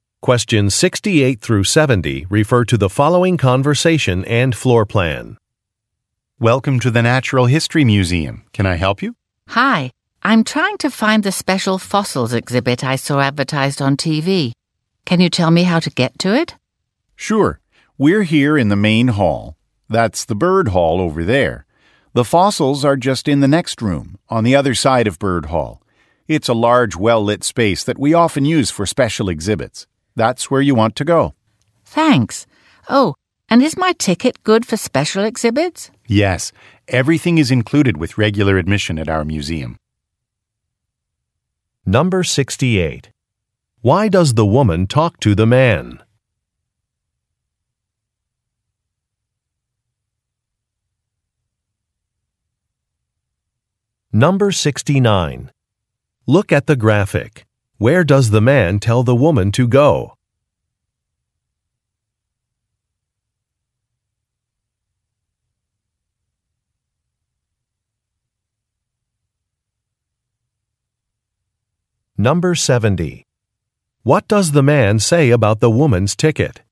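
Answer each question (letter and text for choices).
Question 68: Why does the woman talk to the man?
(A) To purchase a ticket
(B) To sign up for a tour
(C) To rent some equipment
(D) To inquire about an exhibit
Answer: (D) To inquire about an exhibit

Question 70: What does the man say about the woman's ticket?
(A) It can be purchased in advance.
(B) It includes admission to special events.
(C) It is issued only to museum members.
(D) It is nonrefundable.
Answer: (B) It includes admission to special events.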